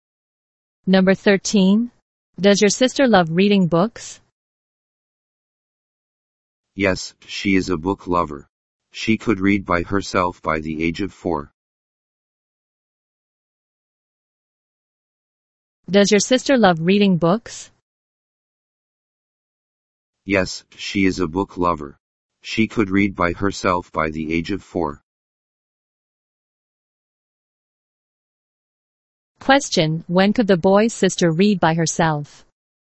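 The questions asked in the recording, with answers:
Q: Question, when could the boy's sister read by herself?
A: By the age of 4.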